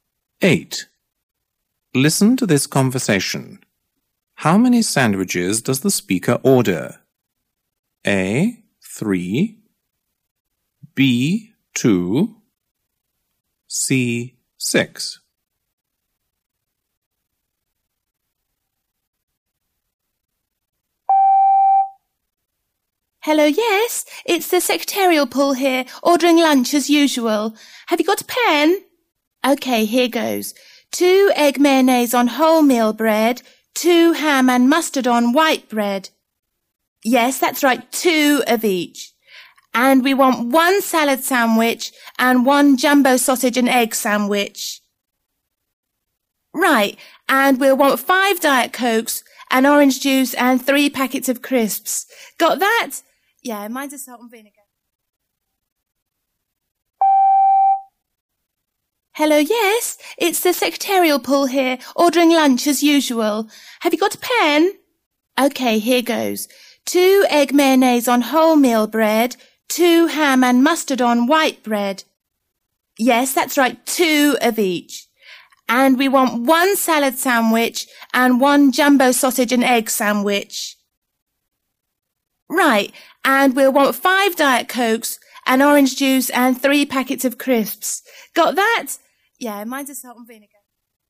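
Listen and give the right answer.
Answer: C: 6.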